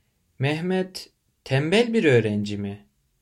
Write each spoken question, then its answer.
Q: Mehmet tembel bir öğrenci mi?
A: Hayır, o tembel değil. O çalışkan bir öğrenci.